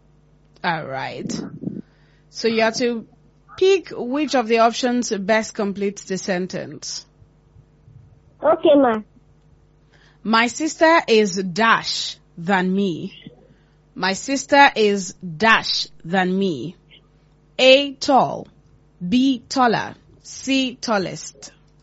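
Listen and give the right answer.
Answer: B: taller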